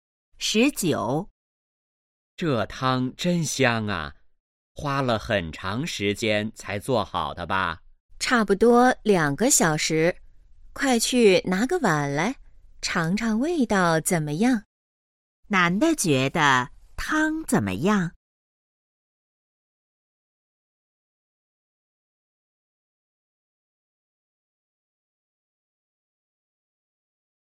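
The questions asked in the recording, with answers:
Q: 男的觉得汤怎么样?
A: 很香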